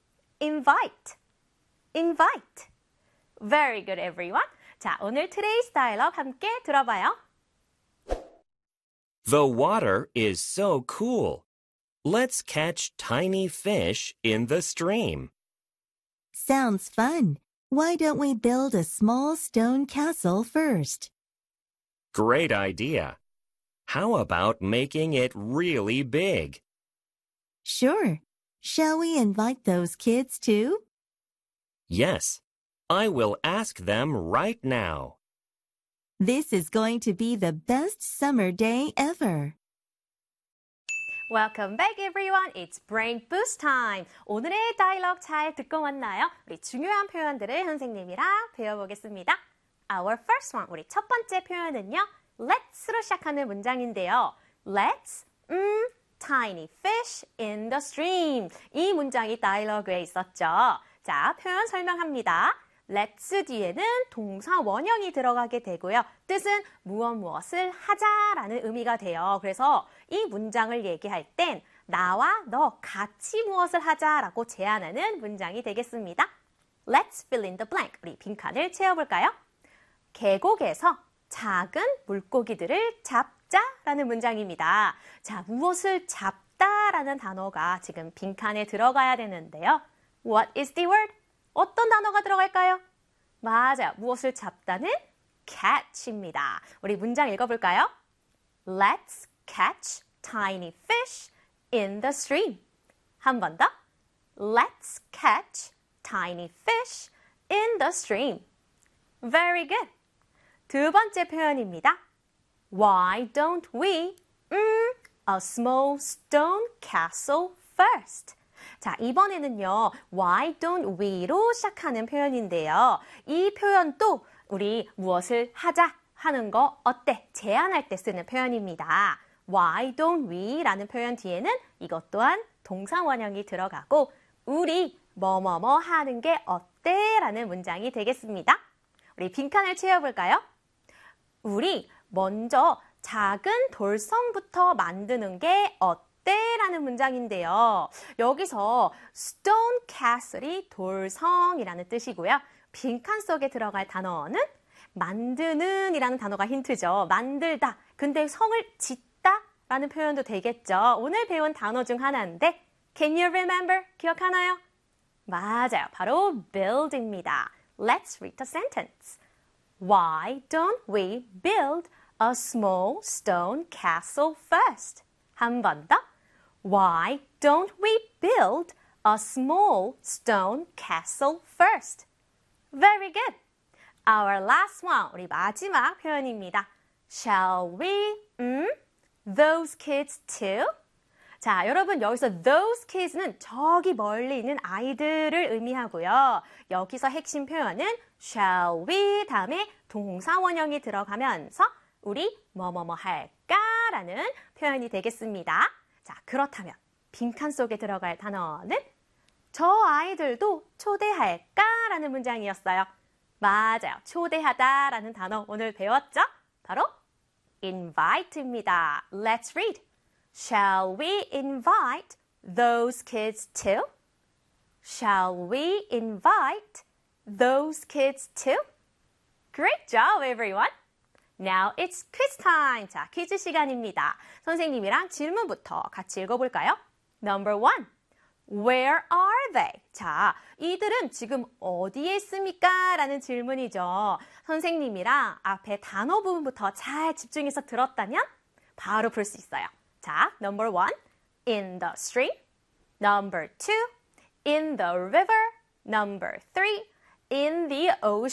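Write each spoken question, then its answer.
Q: Number one, where are they?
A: 1: in the stream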